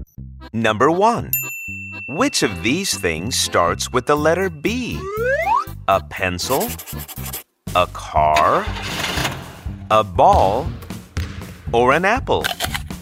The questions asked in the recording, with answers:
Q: Which of these things starts with the letter B?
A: You could hear the B sound in the word ball.